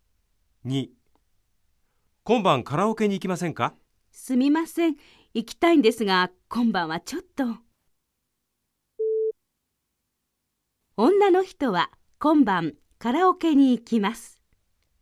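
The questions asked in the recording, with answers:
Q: 女の人は今晩カラオケに行きます。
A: ×(正しくない)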